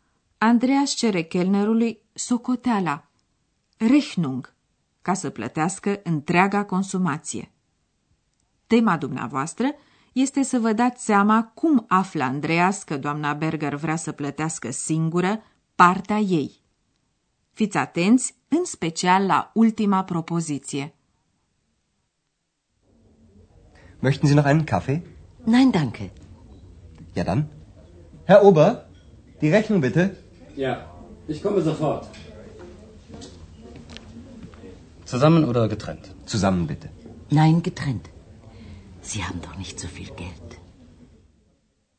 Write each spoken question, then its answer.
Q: Tema dumneavoastră este să vă dați seama cum află Andreas că doamna Berger vrea să plătească singură partea ei.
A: Doamna Berger vrea să plătească singură ceea ce a consumat ea